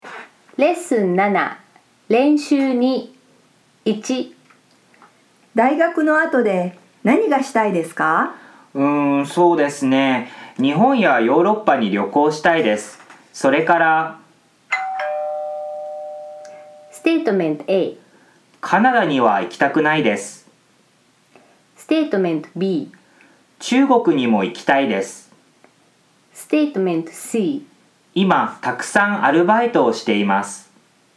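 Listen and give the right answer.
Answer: B: 中国にも行きたいです。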